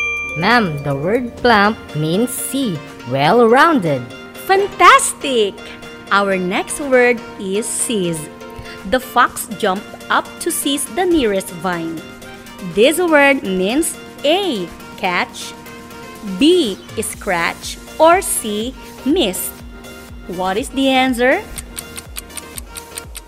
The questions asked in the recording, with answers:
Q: What is the answer?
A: Ma'am, the word seize means A.